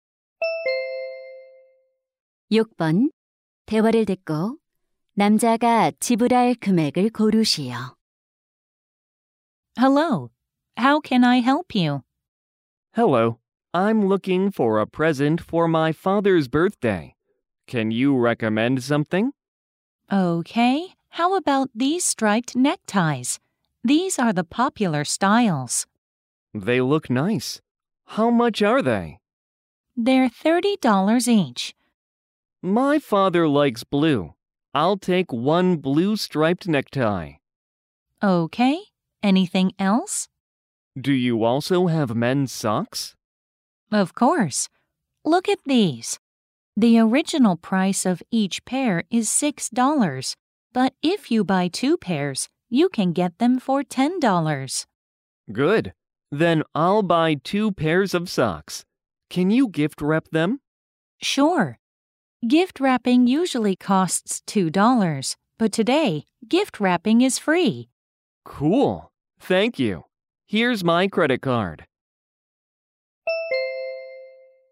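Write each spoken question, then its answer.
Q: 대화를 듣고 남자가 지불할 금액을 고르시오.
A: $40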